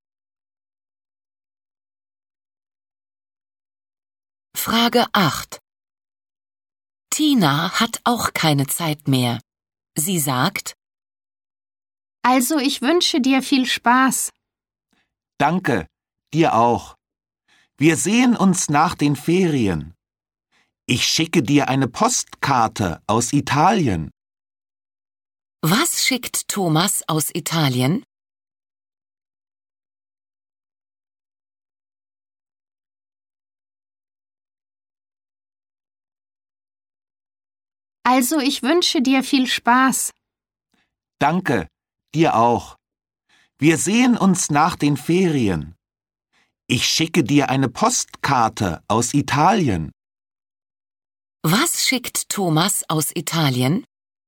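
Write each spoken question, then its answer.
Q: Was schickt Thomas aus Italien?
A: Eine Postkarte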